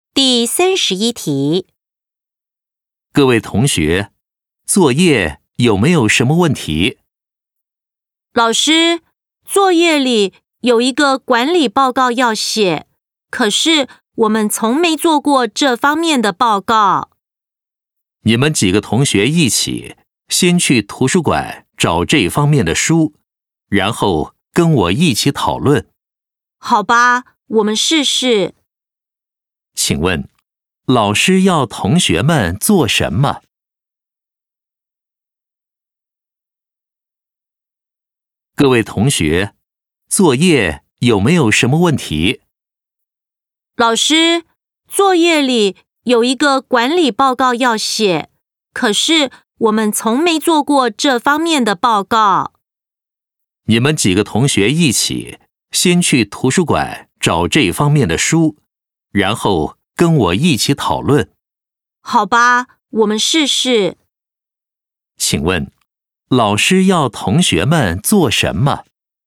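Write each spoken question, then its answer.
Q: 请问,老师要同学们做什么?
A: 先去图书馆找管理报告方面的书,然后跟老师一起讨论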